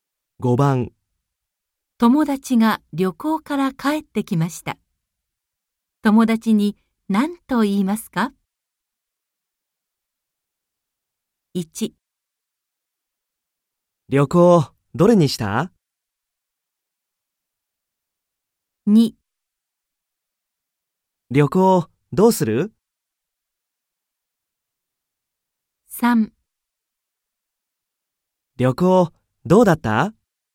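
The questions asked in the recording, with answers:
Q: 友達が旅行から帰ってきました。友達に何と言いますか?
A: 3: 旅行どうだった?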